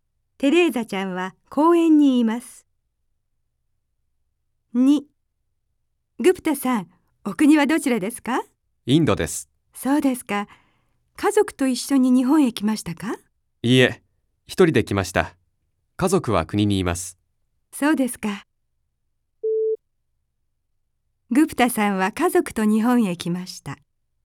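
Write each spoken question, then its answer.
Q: グプタさんは家族と日本へ来ました。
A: ×(正しくない。一人で来ました)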